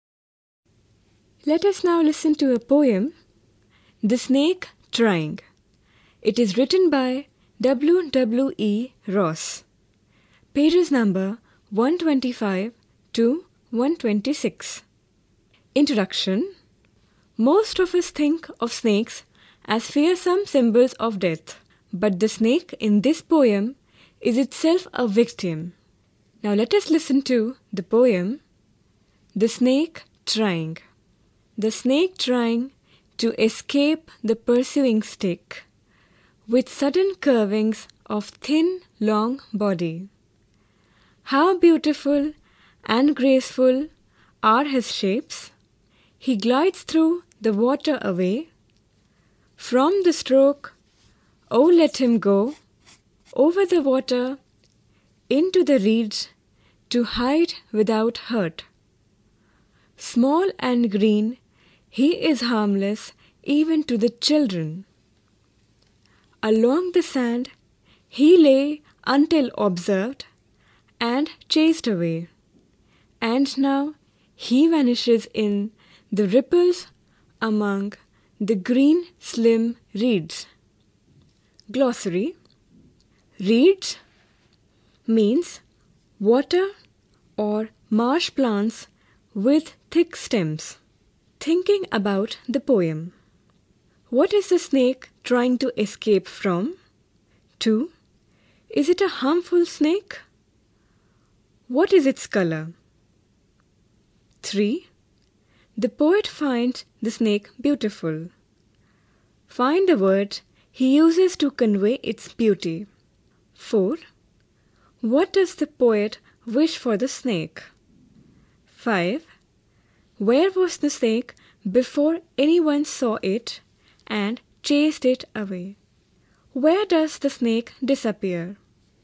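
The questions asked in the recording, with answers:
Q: What is the snake trying to escape from?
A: The pursuing stick

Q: Is it a harmful snake? What is its color?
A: No, it is harmless; it is green

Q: Find the word he uses to convey its beauty.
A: Graceful

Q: What does the poet wish for the snake?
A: That it may go over the water into the reeds to hide without hurt

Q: Where was the snake before anyone saw it and chased it away?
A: Lying along the sand

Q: Where does the snake disappear?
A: In the ripples among the green slim reeds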